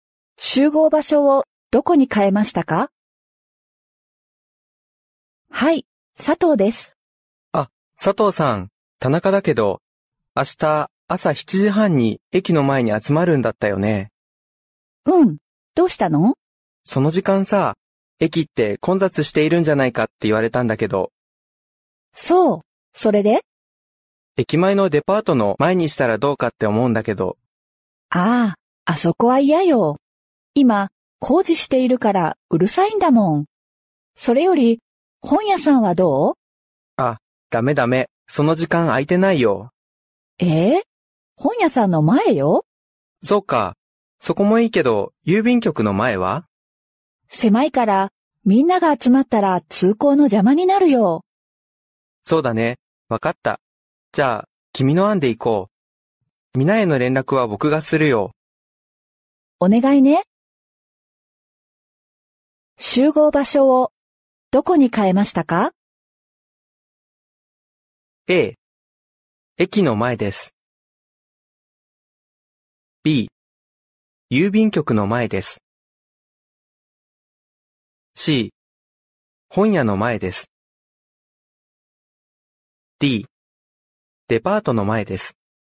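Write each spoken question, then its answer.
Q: 集合場所をどこに変えましたか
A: C: 本屋の前です。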